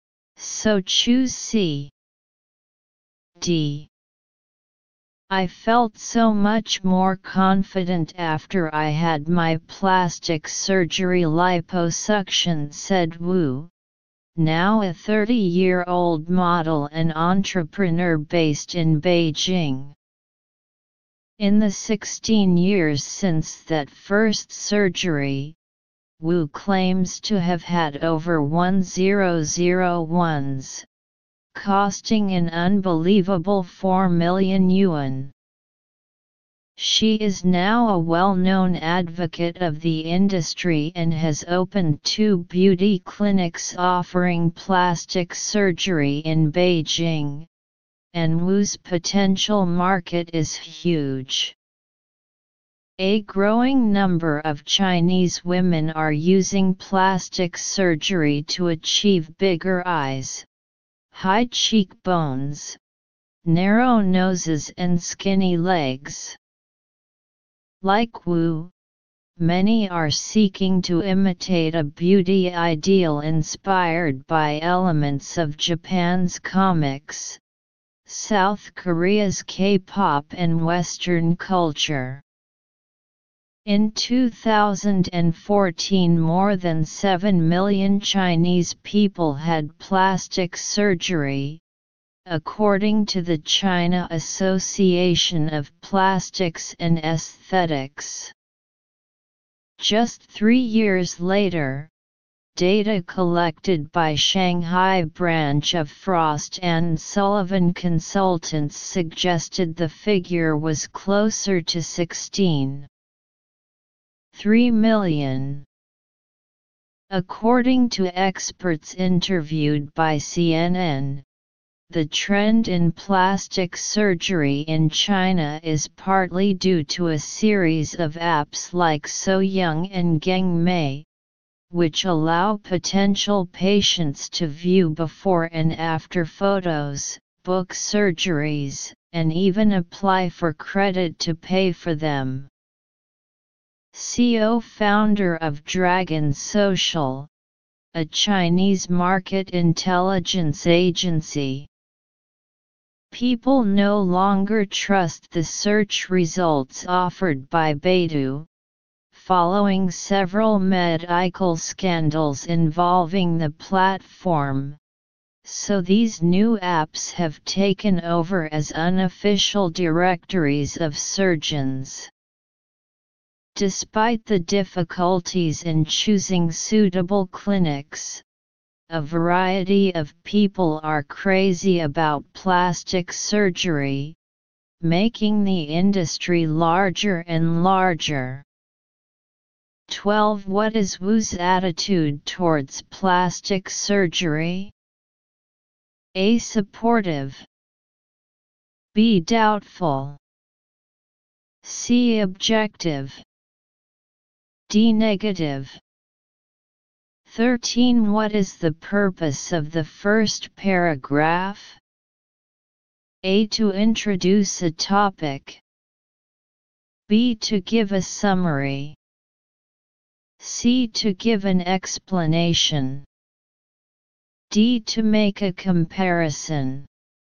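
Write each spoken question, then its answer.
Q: What is Wu's attitude towards plastic surgery?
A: A: Supportive.

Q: What is the purpose of the first paragraph?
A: A: To introduce a topic.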